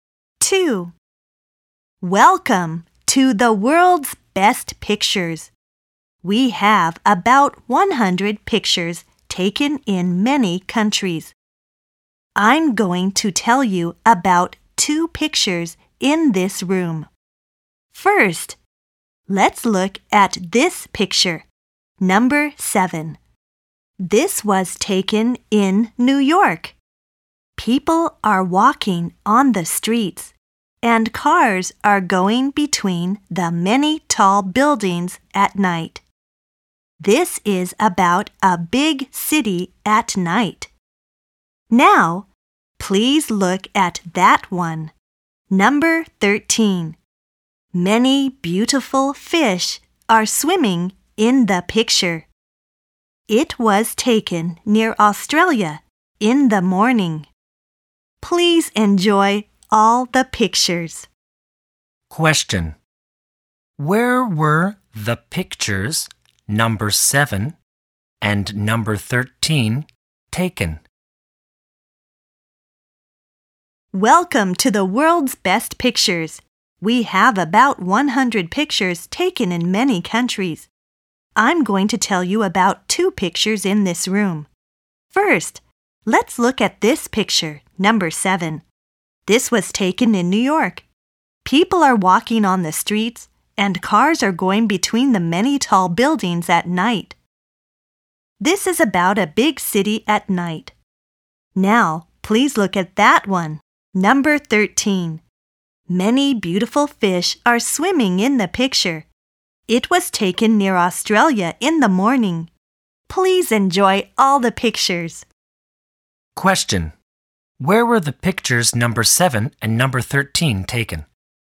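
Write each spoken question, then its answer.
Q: Where were the pictures number 7 and number 13 taken?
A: Number 7 in New York, number 13 near Australia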